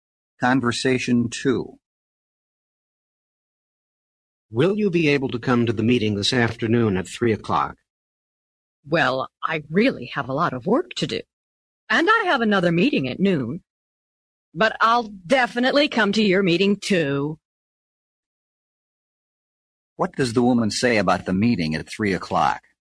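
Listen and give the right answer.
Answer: She will definitely come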